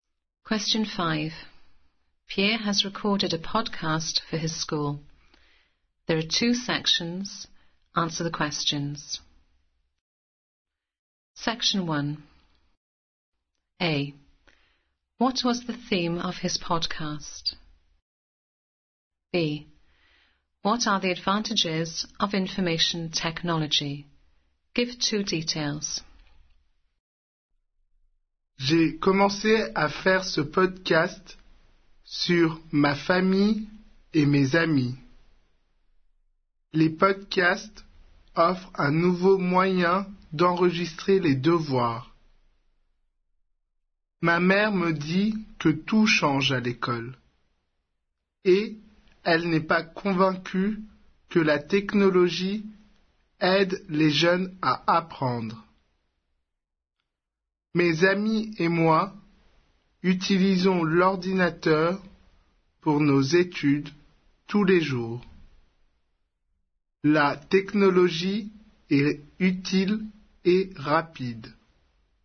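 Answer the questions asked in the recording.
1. His family and friends
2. It is useful and fast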